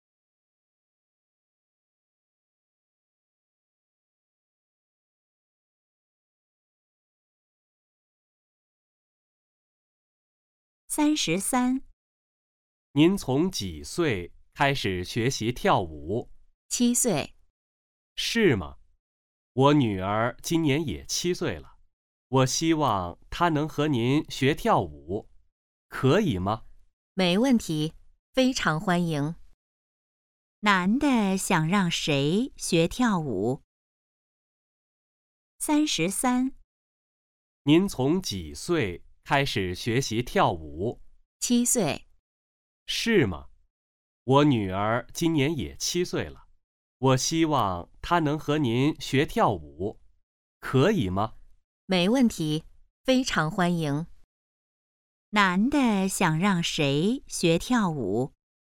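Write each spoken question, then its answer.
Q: 男的想让谁学跳舞?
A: 他的女儿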